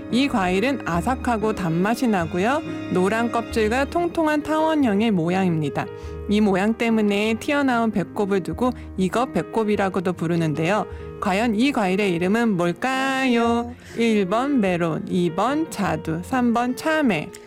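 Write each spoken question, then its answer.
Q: 과연 이 과일의 이름은 뭘까요? 1번 메론, 2번 자두, 3번 참외.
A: 3: 참외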